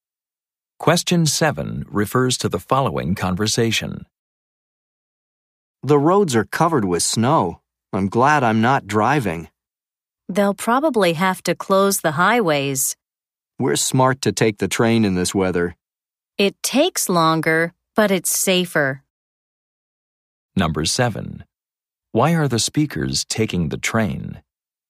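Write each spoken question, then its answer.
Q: Why are the speakers taking the train?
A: The roads are covered with snow; it's safer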